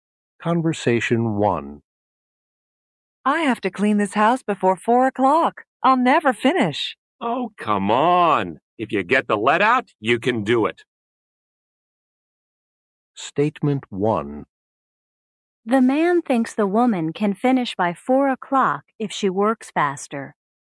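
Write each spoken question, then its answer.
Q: The man thinks the woman can finish by 4 o'clock if she works faster.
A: True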